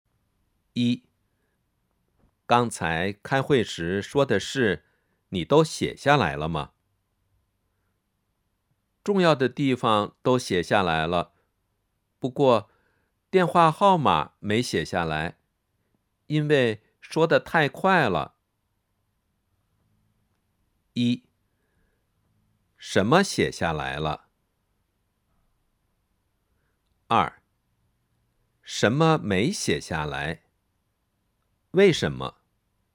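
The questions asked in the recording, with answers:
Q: 什么写下来了?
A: 重要的地方

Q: 什么没写下来?为什么?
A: 电话号码,因为说得太快了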